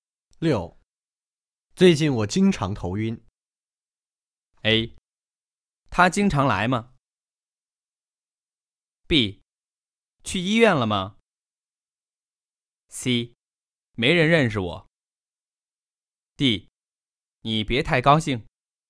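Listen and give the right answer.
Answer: B: 去医院了吗?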